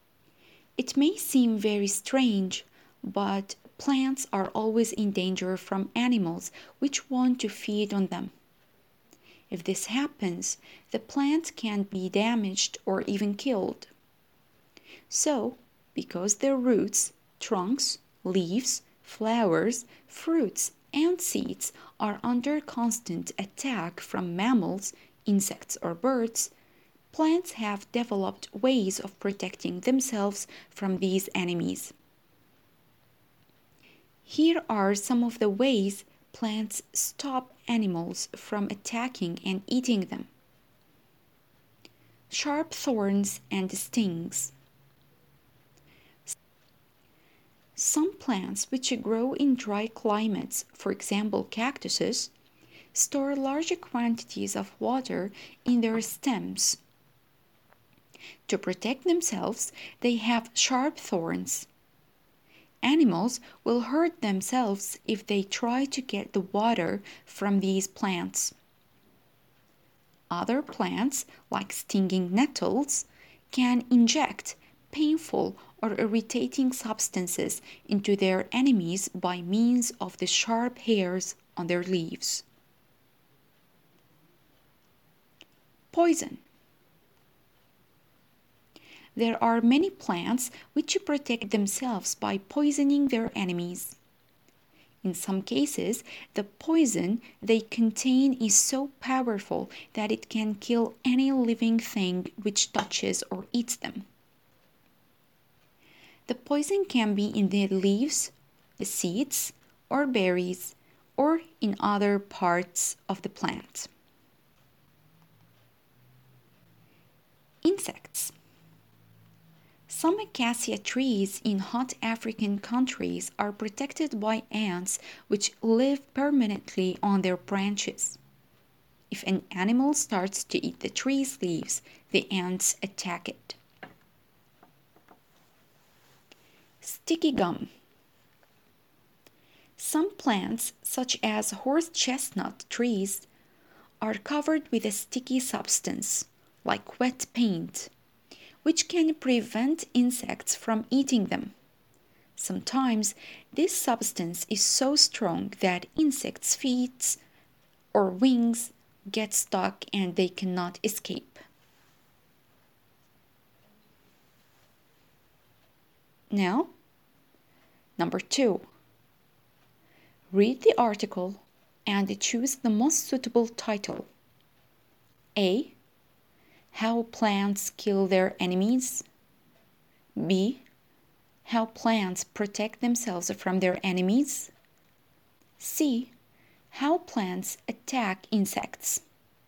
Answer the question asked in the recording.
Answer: The answer is B. How plants protect themselves from their enemies.